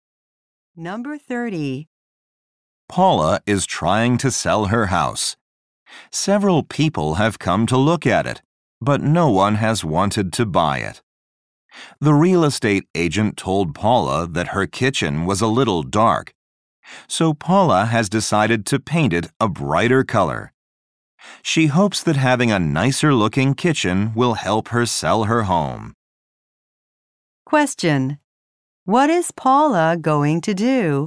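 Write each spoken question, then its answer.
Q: What is Paula going to do?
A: Paint her kitchen a brighter color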